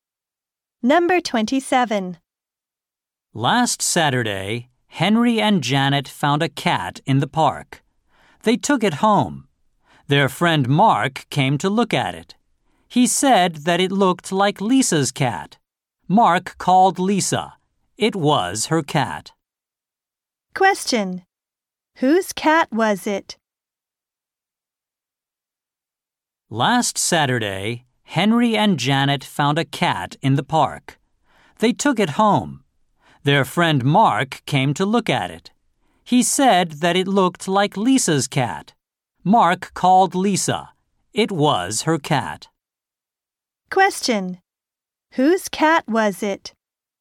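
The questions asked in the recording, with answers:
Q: Whose cat was it?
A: Lisa's.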